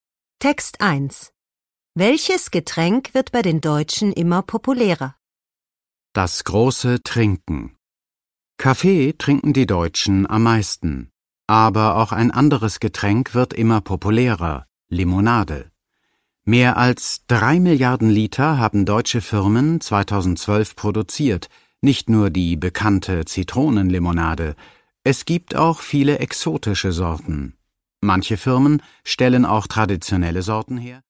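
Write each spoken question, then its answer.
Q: Welches Getränk wird bei den Deutschen immer populärer?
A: Limonade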